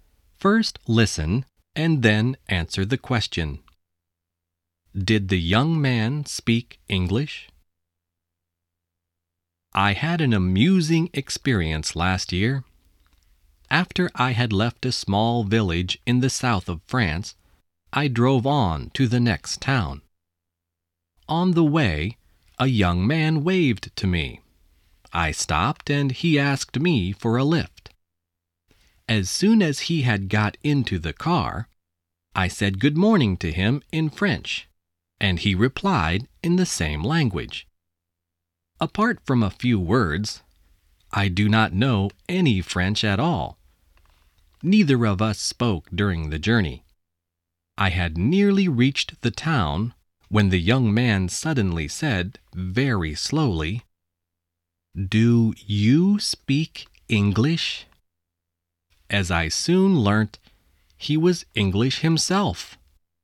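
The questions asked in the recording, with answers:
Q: Did the young man speak English?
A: Yes, he was English himself.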